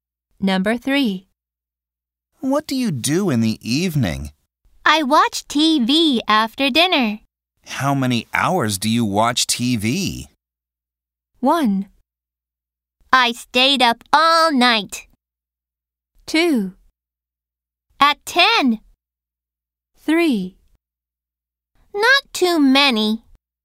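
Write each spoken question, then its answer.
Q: How many hours do you watch TV?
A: 3: Not too many.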